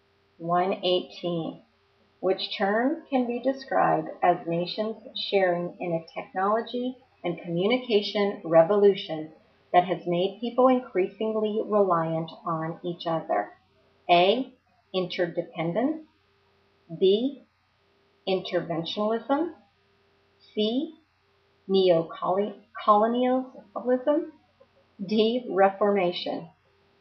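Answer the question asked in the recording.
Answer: A: Interdependence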